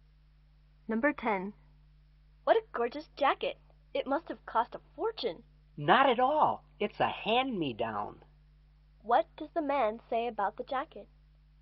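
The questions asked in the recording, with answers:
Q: What does the man say about the jacket?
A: It was a hand-me-down, so it cost him nothing.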